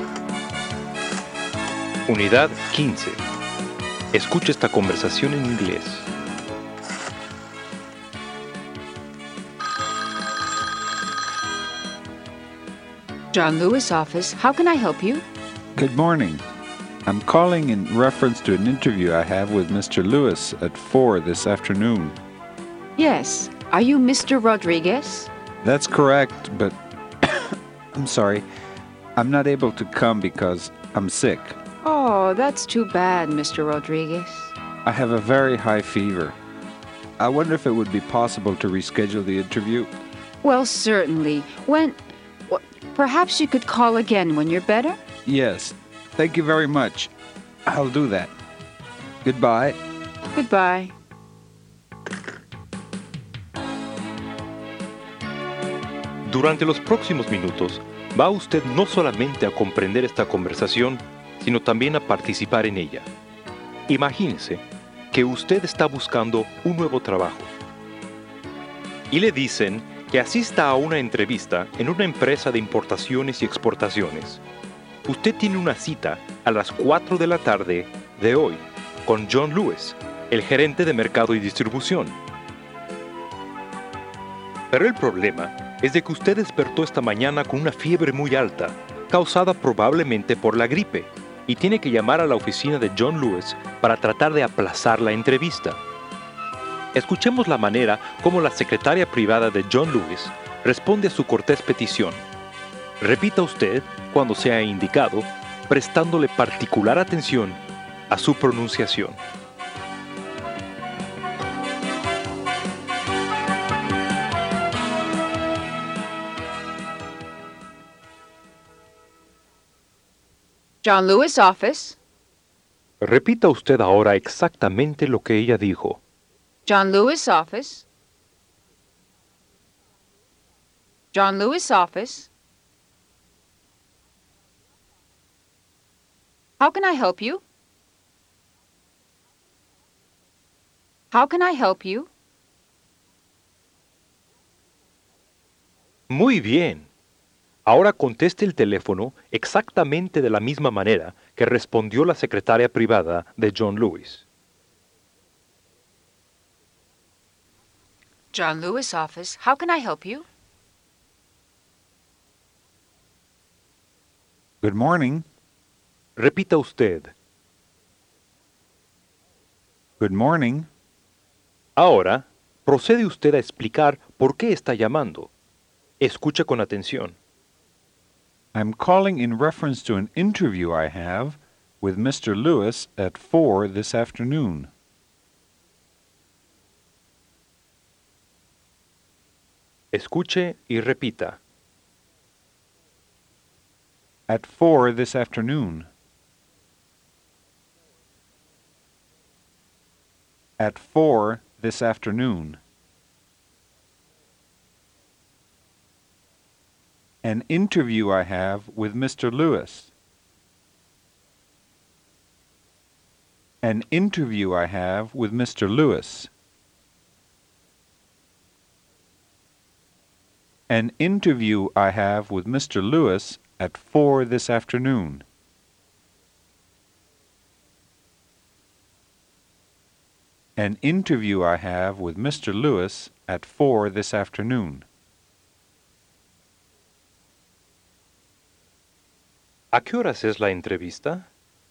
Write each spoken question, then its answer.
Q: ¿A qué horas es la entrevista?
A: At 4 this afternoon.